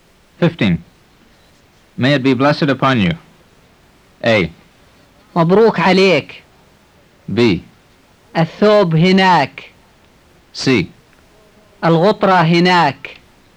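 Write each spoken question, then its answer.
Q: May it be blessed upon you.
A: A: مبروك عليك.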